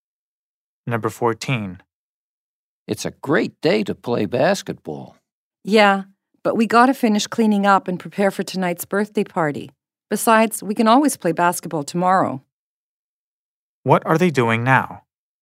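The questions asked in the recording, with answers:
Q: What are they doing now?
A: Cleaning up to get ready for a birthday party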